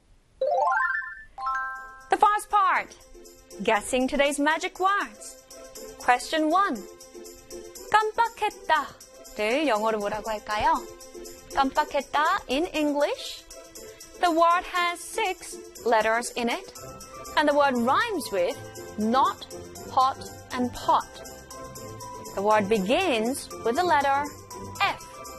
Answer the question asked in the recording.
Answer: 깜빡했다 in English is F-O-R-G-O-T.